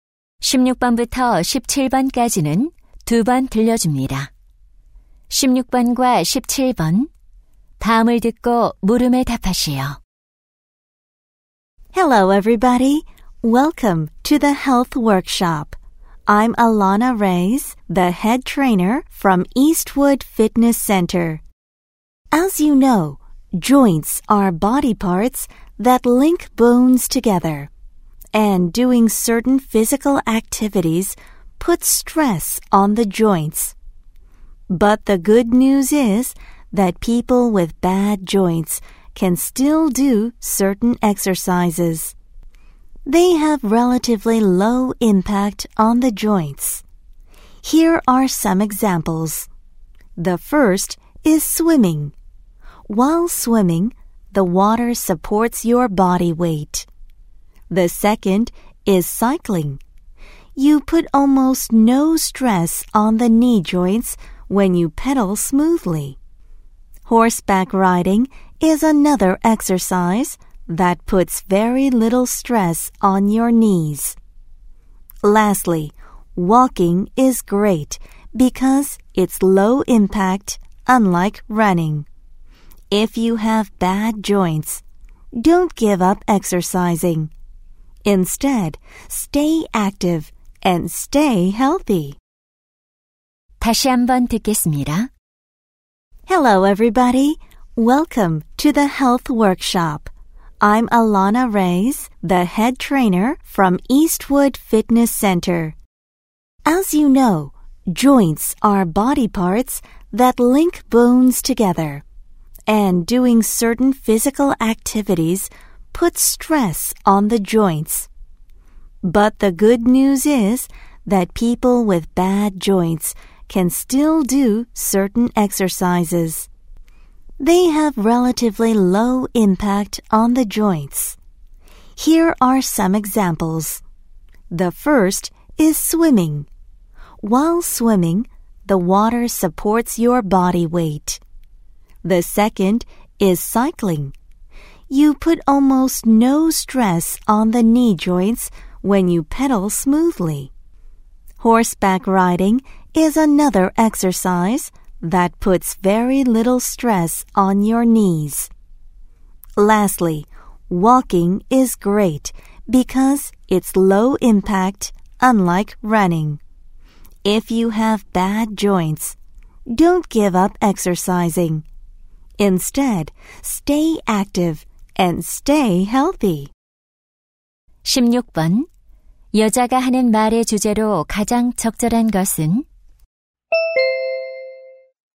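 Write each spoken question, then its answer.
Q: 여자가 하는 말의 주제로 가장 적절한 것은?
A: 관절이 안 좋은 사람에게 좋은, 관절에 부담이 적은 운동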